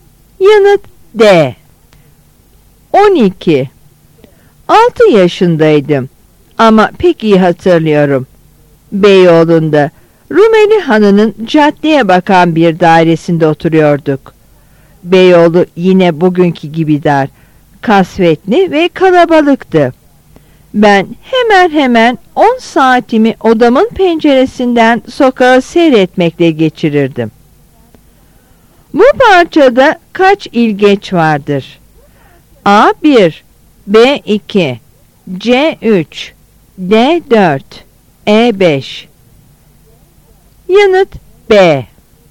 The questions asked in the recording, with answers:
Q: Bu parçada kaç ilgeç vardır?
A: Yanıt B.